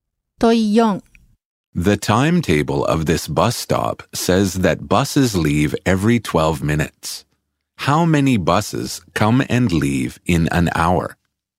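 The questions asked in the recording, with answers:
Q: How many buses come and leave in an hour?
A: Five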